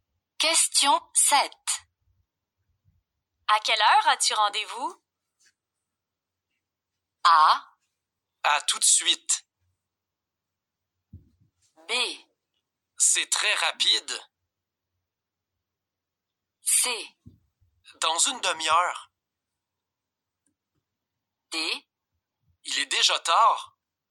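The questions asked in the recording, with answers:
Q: À quelle heure as-tu rendez-vous?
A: C: Dans une demi-heure.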